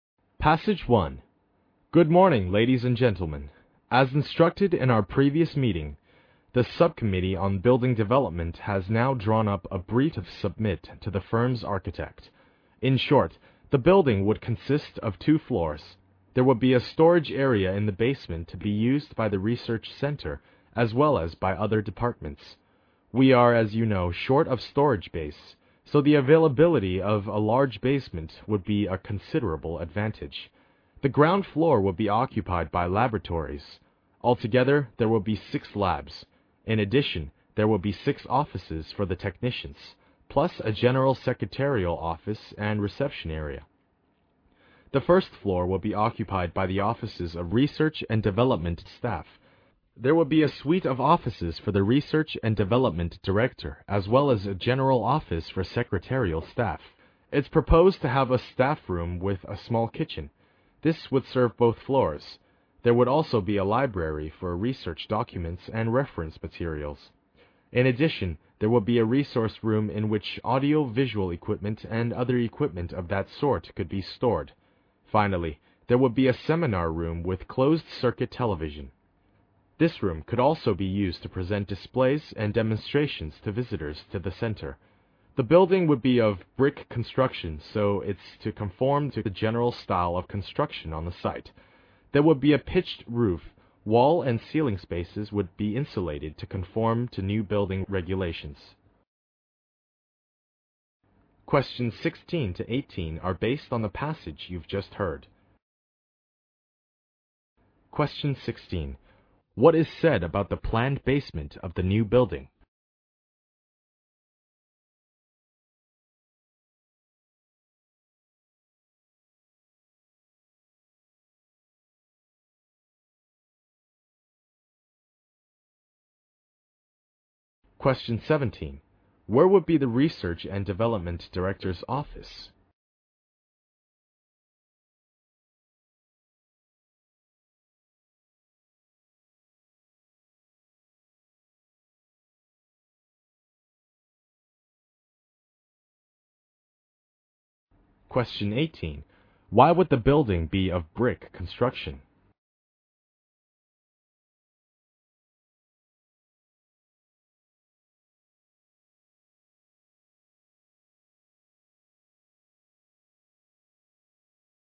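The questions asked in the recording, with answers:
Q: What is said about the planned basement of the new building?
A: It will be a large storage area shared by the research center and other departments.

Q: Where would be the Research and Development Director's office?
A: On the first floor.

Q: Why would the building be of brick construction?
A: To match the general style of construction on the site.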